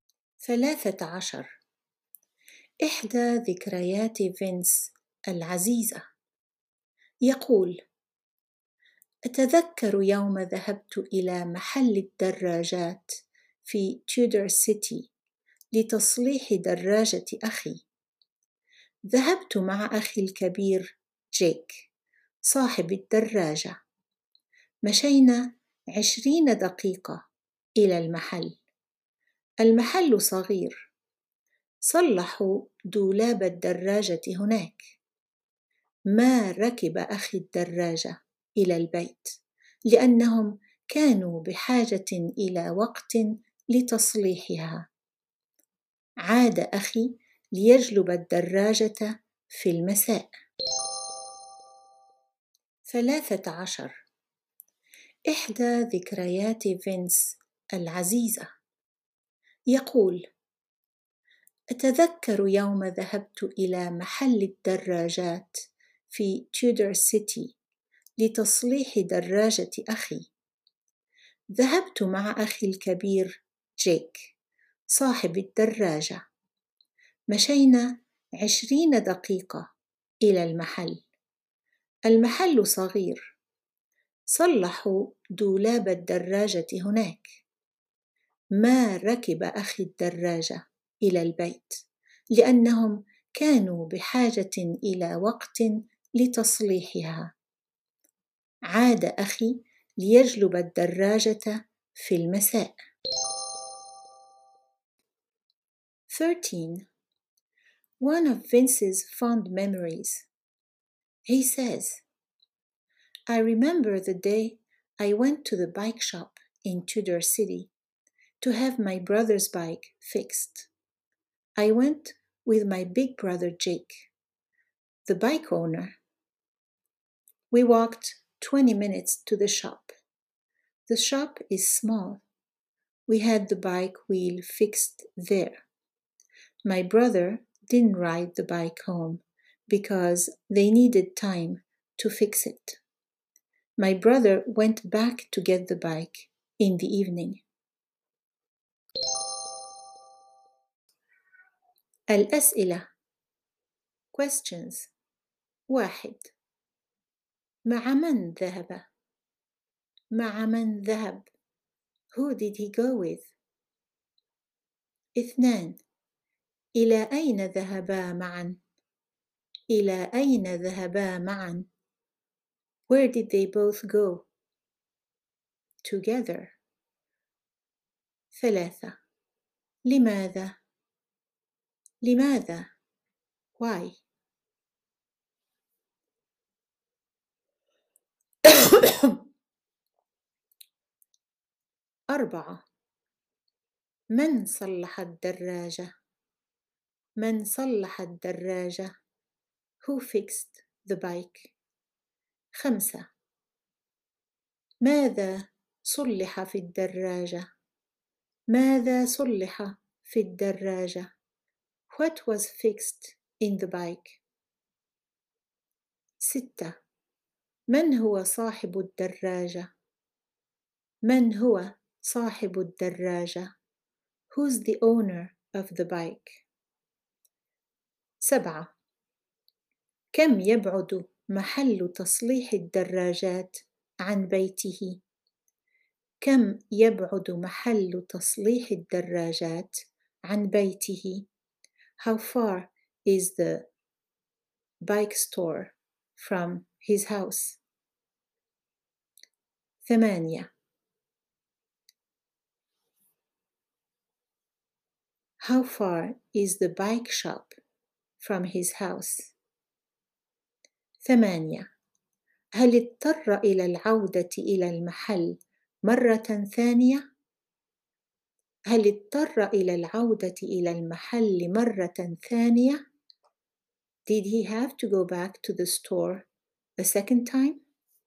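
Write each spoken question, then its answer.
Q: مع من ذهب؟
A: مع أخيه الكبير جيك

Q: إلى أين ذهبا معا؟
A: إلى محل الدراجات في تيودر سيتي

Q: لماذا؟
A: لتصليح دراجة أخيه

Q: من صلح الدراجة؟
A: المحل (العاملون في محل الدراجات)

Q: ماذا صلح في الدراجة؟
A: الدولاب

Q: من هو صاحب الدراجة؟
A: أخوه الكبير جيك

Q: كم يبعد محل تصليح الدراجات عن بيته؟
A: 20 دقيقة مشيًا

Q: هل اضطر إلى العودة إلى المحل مرة ثانية؟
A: لا، أخوه عاد ليجلب الدراجة في المساء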